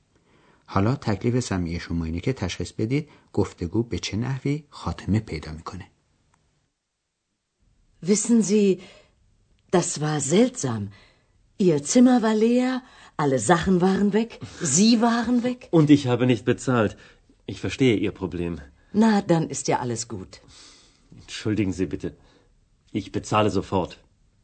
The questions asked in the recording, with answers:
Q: حالا تکلیف سمعی شما اینه که تشخیص بدید گفتگو به چه نحوی خاتمه پیدا میکنه.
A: شاید متوجه شدید که آقای مایر قصد داره حالا پول هتل رو بپردازه و حساب خودش رو تسویه کنه.